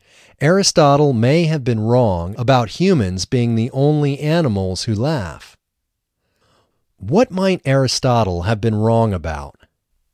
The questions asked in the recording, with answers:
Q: What might Aristotle have been wrong about?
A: Aristotle might have been wrong about humans being the only animals who laugh.